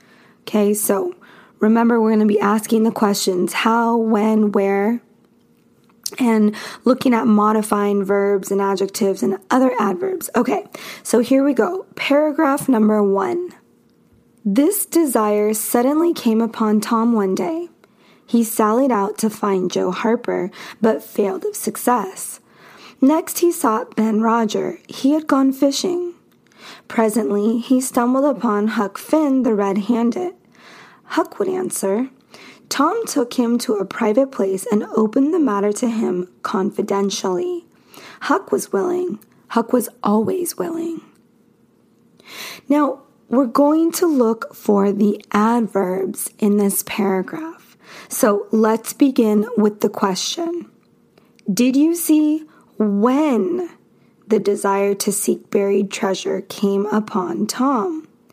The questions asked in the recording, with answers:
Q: Did you see when the desire to seek buried treasure came upon Tom?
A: So our adverb is suddenly.